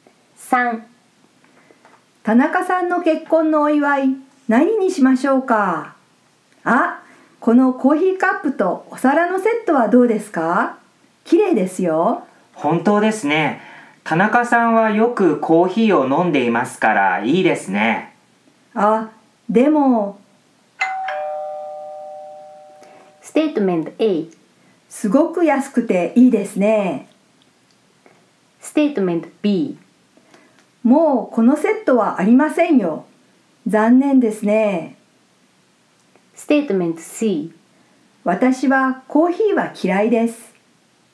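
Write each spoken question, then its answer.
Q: 田中さんの結婚のお祝い何にしましょうか?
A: B: もうこのセットはありませんよ。残念ですね。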